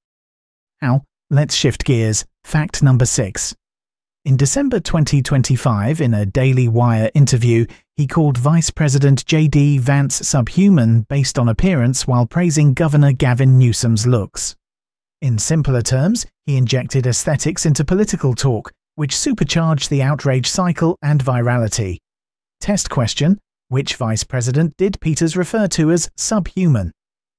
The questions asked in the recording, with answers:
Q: which vice president did Peters refer to as subhuman?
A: Correct answer, J.D. Vance.